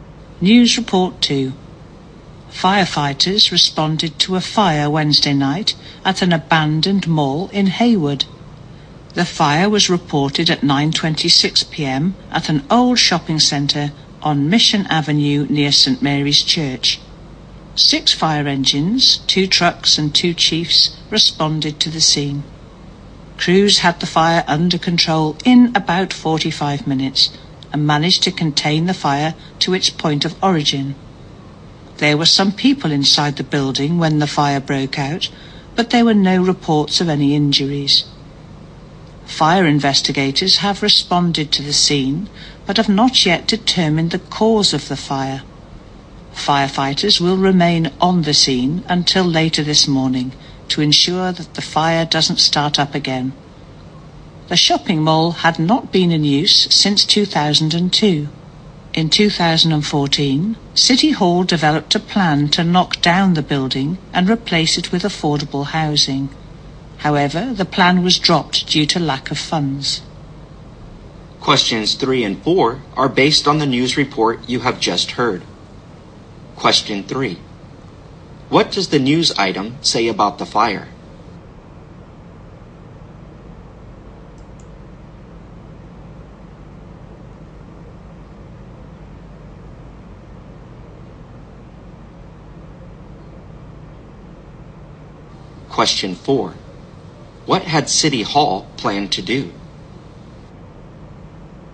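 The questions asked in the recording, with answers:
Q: What does the news item say about the fire?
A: No one was reported injured, and it was kept to where it started

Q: What had City Hall planned to do?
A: Knock down the mall and build affordable housing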